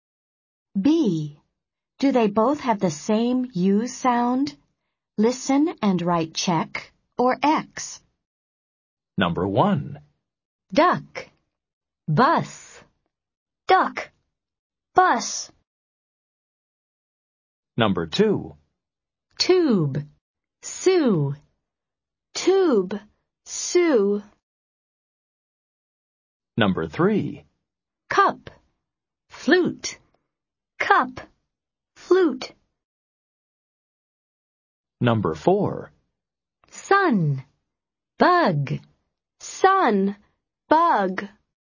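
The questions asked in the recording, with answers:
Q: Do they both have the same U sound?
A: Yes (check)

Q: Do they both have the same U sound?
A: Yes (check)

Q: Do they both have the same U sound?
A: Yes (check)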